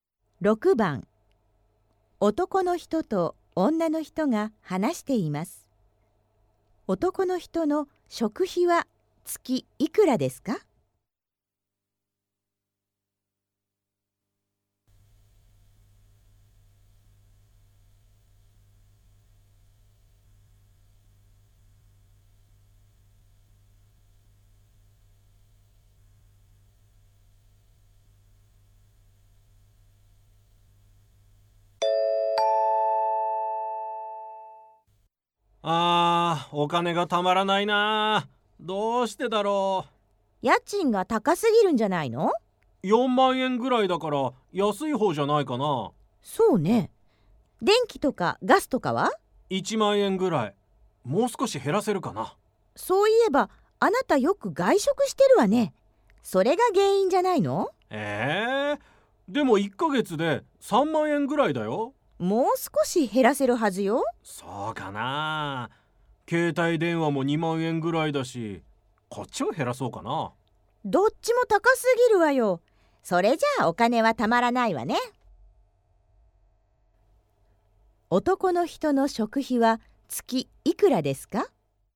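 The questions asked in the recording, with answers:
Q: 男の人の食費は月いくらですか?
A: 3万円ぐらい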